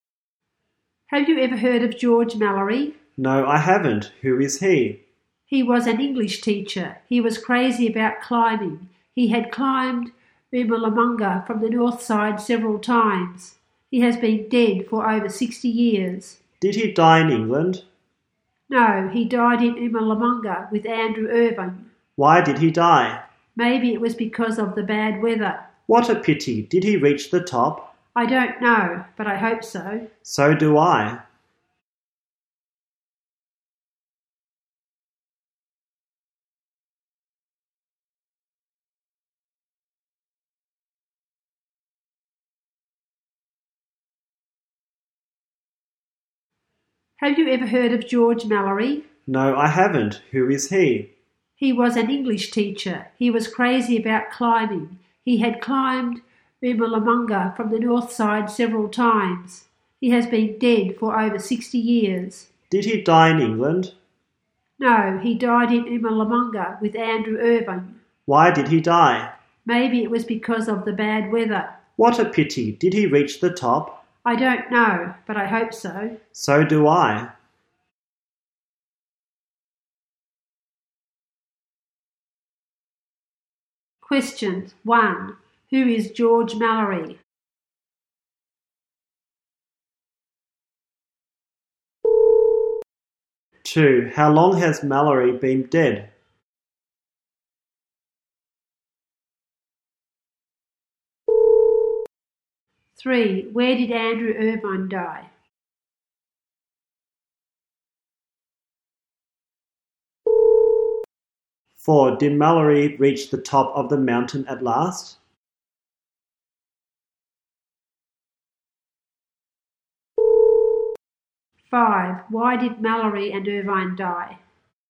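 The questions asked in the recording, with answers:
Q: Who is George Mallory?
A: An English teacher

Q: How long has Mallory been dead?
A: For over 60 years

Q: Where did Andrew Irvine die?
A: On Qomolangma

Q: Did Mallory reach the top of the mountain at last?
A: Nobody knows

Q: Why did Mallory and Irvine die?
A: Maybe because of the bad weather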